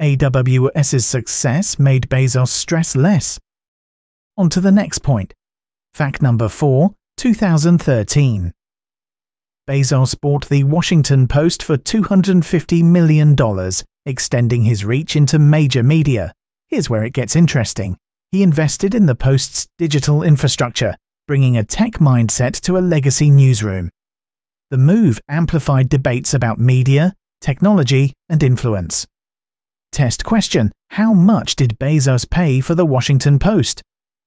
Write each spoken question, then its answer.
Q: How much did Bezos pay for the Washington Post?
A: Correct answer. $250 million.